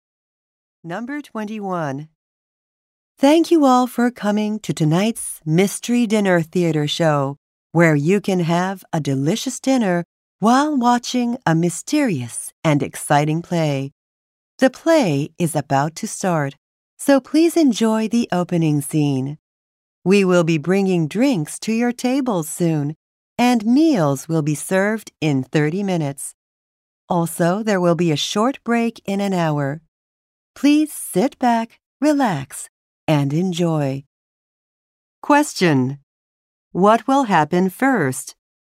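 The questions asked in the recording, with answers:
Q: What will happen first?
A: The play will start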